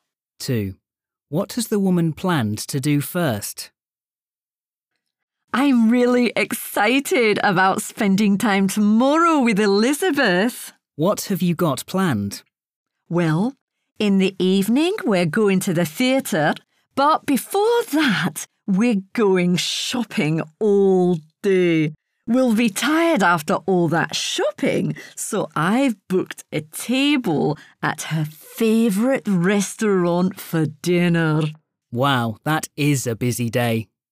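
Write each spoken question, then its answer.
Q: What has the woman planned to do first?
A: Go shopping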